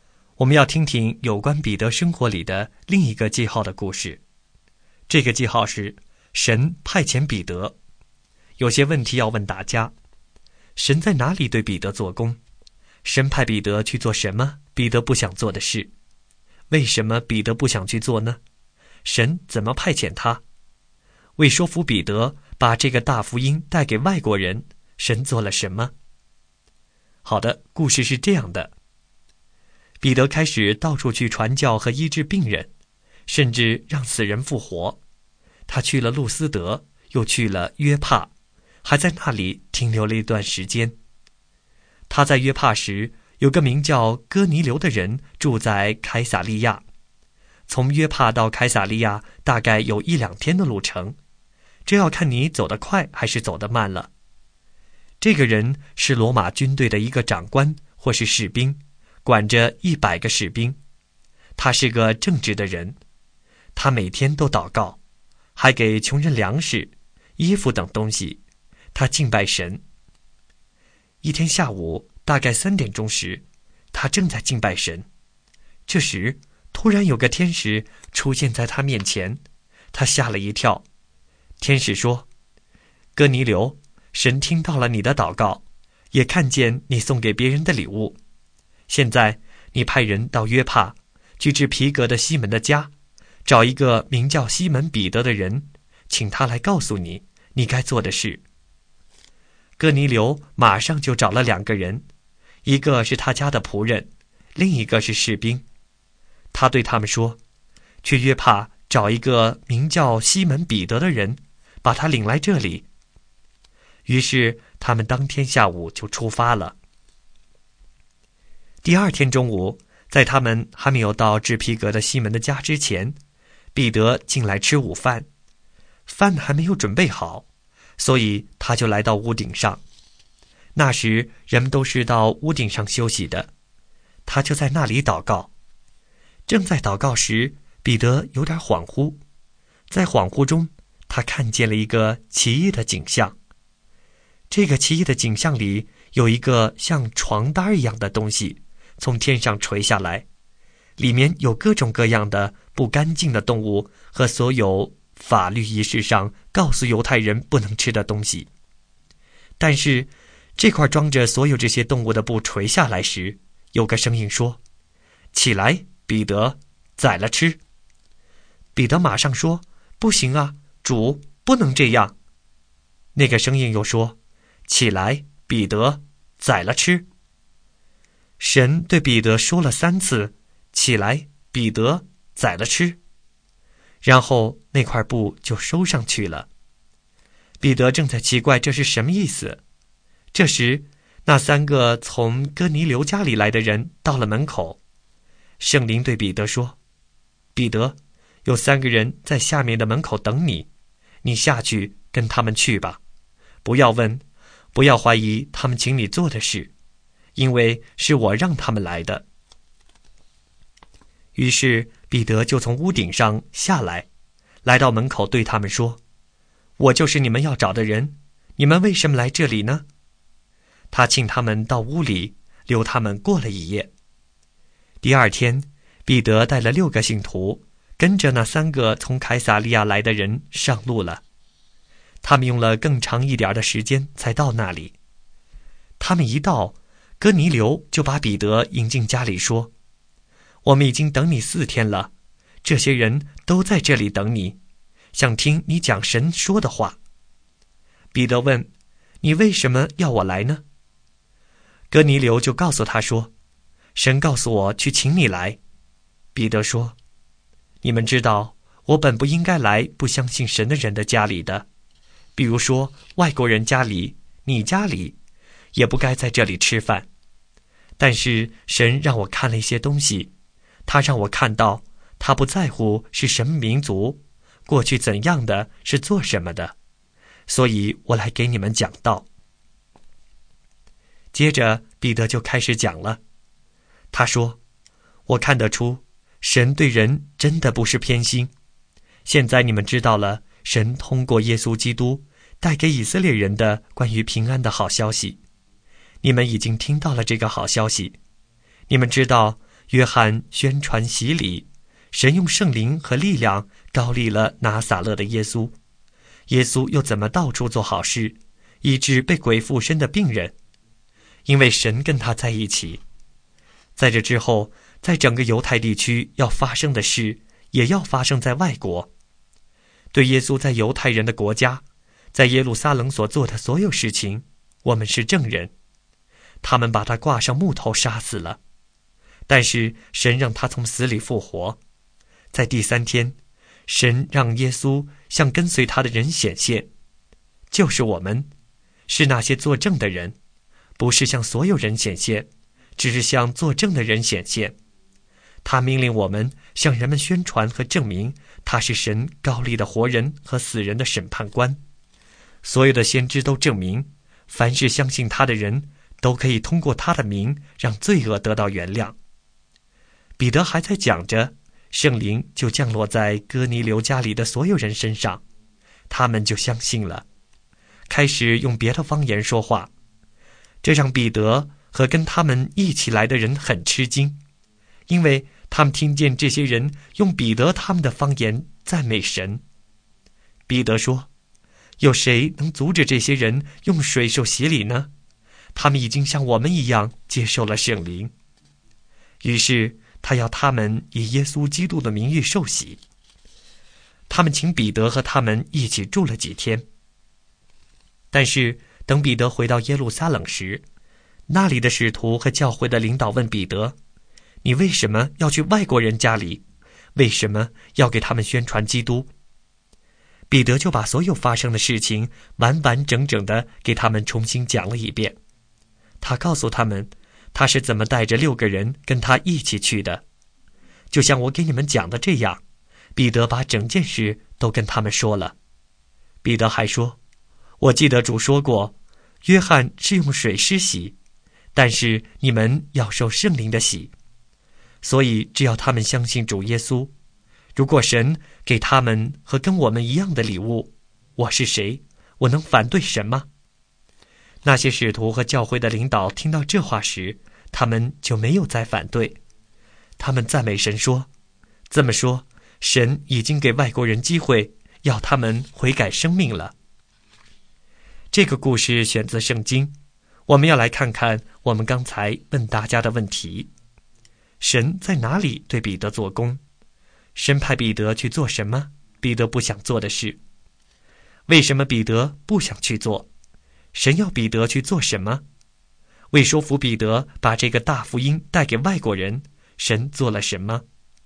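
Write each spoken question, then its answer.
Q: 神派彼得去做什么彼得不想做的事?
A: 去外国人哥尼流的家里给他们讲道

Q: 为什么彼得不想去做?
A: 因为犹太人不应该进外国人的家,也不该在那里吃饭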